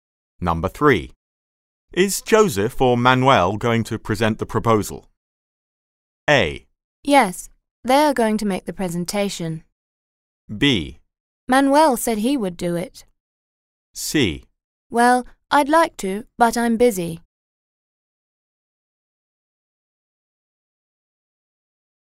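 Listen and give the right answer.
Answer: B: Manuel said he would do it.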